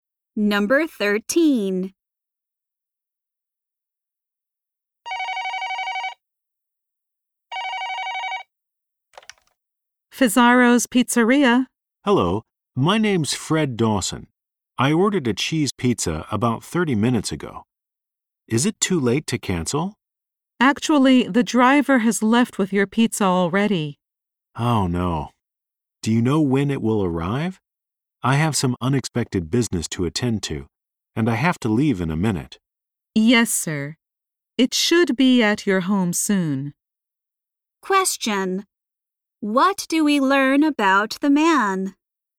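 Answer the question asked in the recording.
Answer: He wants to cancel his pizza order because he has to leave soon.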